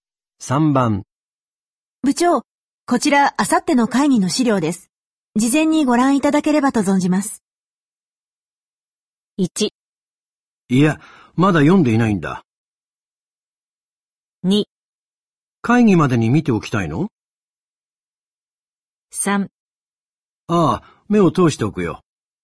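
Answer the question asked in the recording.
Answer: 3: ああ、目を通しておくよ。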